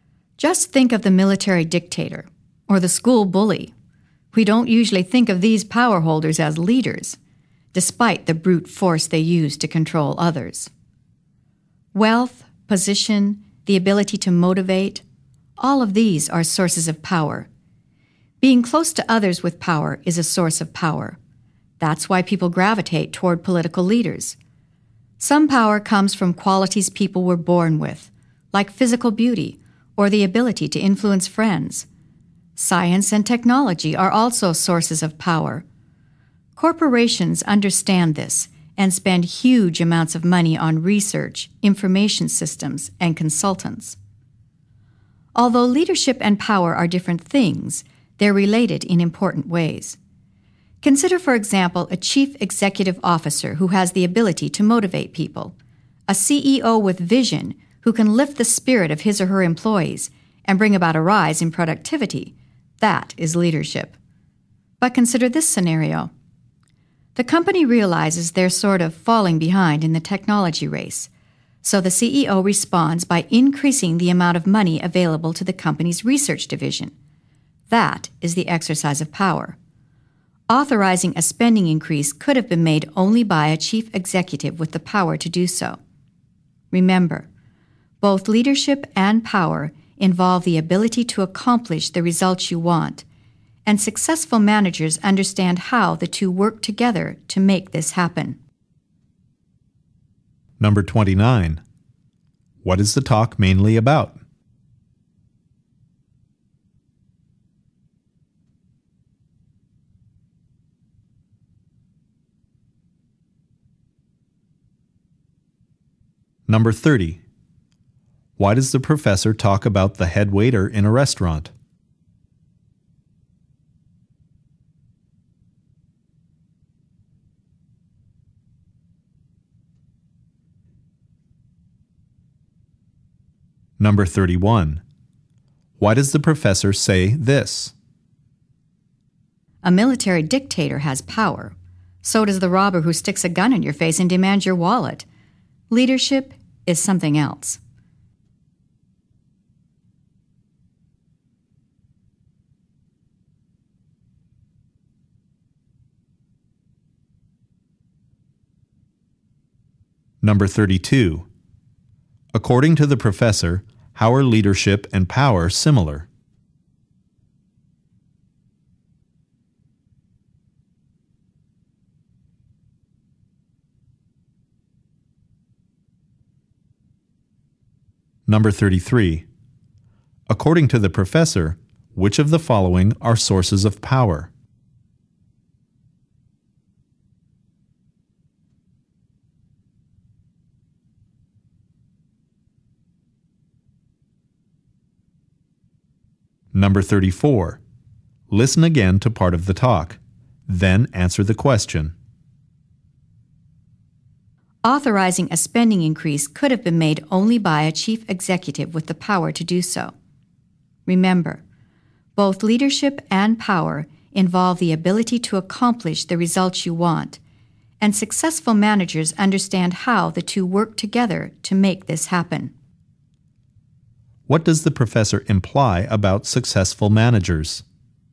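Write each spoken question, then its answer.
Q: According to the professor, how are leadership and power similar?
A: Both involve the ability to accomplish the results you want

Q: What does the professor imply about successful managers?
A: They understand how leadership and power work together to get results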